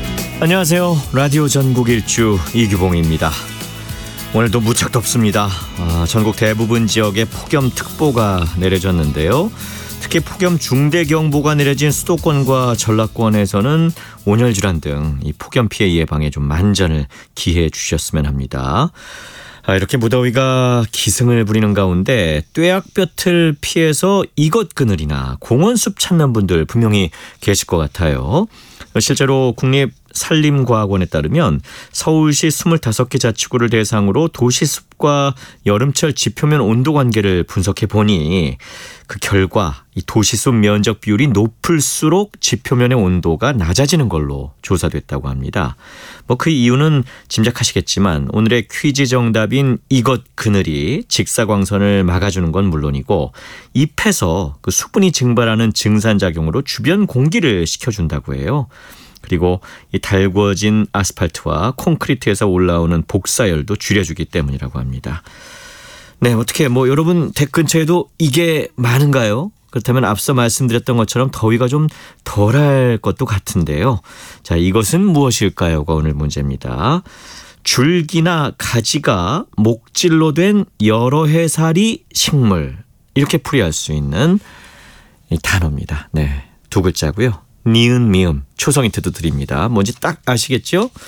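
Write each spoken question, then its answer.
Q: 자, 이것은 무엇일까요?가 오늘 문제입니다.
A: 나무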